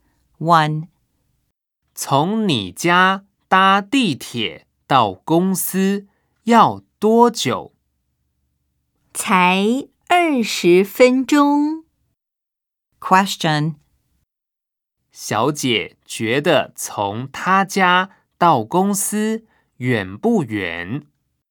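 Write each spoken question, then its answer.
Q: 小姐觉得从她家到公司远不远?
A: 不远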